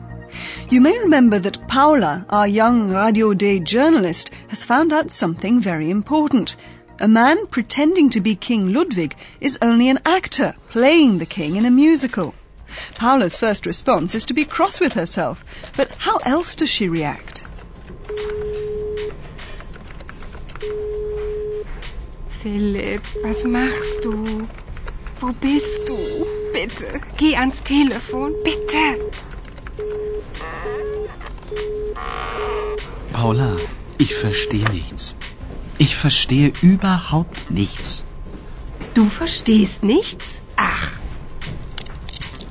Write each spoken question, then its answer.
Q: Paula's first response is to be cross with herself, but how else does she react?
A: Paula's first reaction is to try and phone Philipp.